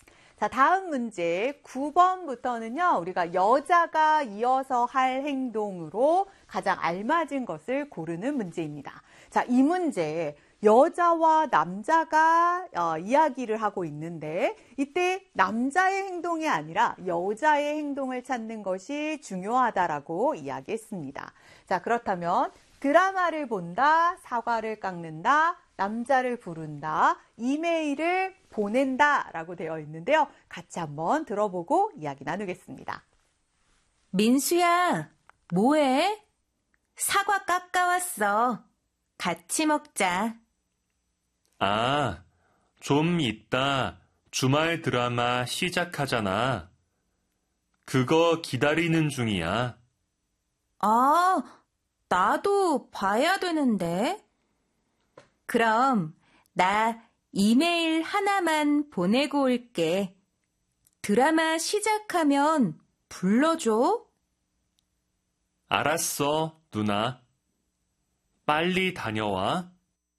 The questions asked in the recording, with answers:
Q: 우리가 여자가 이어서 할 행동으로 가장 알맞은 것을 고르는 문제입니다.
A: 9번의 정답은 이메일을 보낸다.